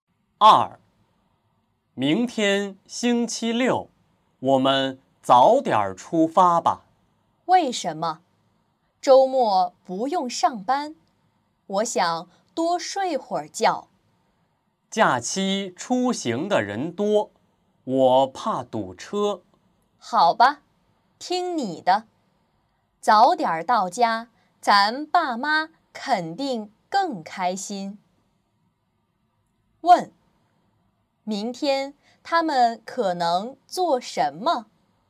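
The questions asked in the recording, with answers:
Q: 问,明天他们可能做什么?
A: 回父母家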